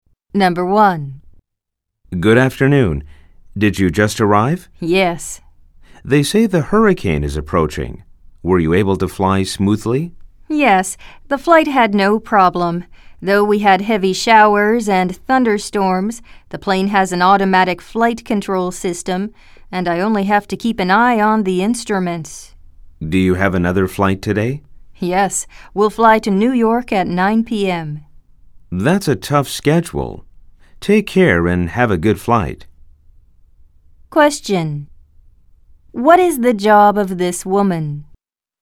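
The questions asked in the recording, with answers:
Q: What is the job of this woman?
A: She is a pilot.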